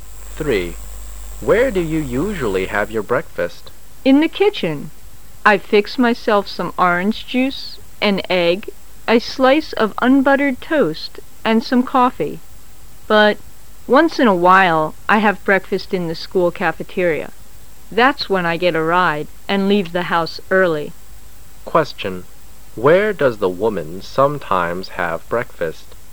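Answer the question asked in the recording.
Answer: In the school cafeteria

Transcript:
[解析] M: Where do you usually have your breakfast? W: In the kitchen. I fix myself some orange juice, an egg, 'a slice of unbuttered toast and some coffee. But once in a while I have breakfast in the school cafeteria. That's why I get a ride and leave the house early. Q:Where does the woman sometimes have breakfast ?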